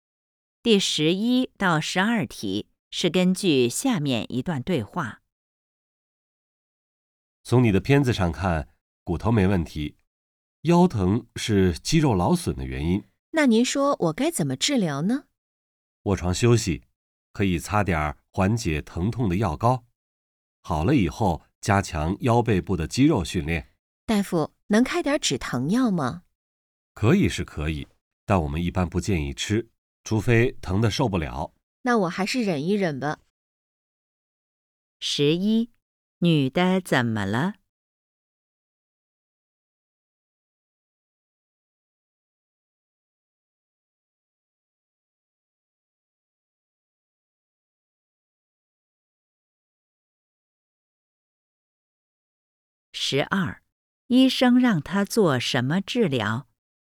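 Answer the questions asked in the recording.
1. 腰疼,肌肉劳损
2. 卧床休息,擦药膏,好后加强腰背肌肉训练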